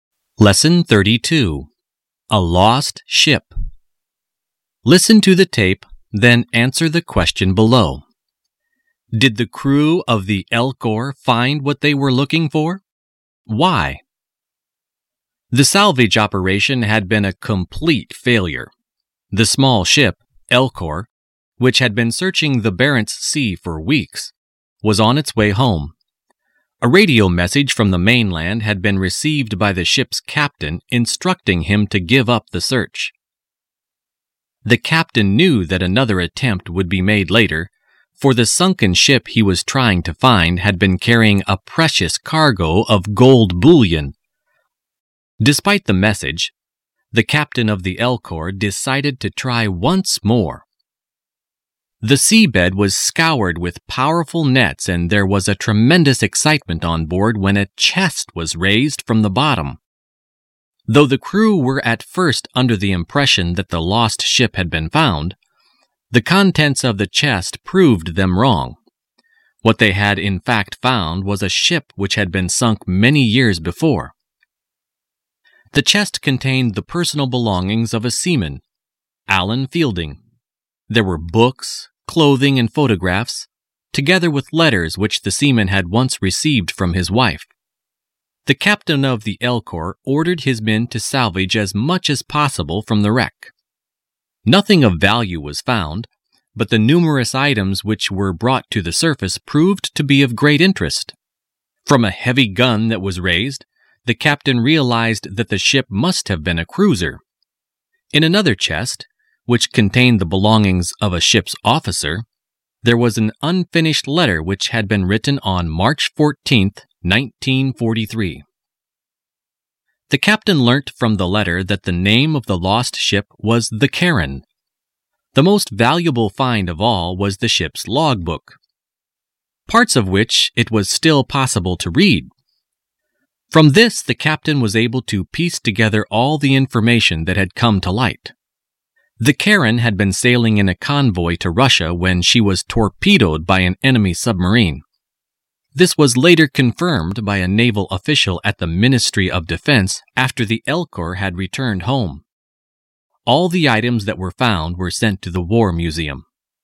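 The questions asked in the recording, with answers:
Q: Did the crew of the Elcor find what they were looking for?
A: No, they found an old sunken cruiser, the Charon, not the ship with the gold.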